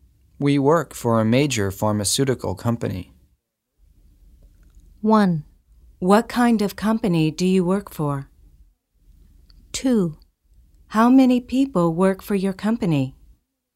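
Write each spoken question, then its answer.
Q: We work for a major pharmaceutical company.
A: 1: What kind of company do you work for?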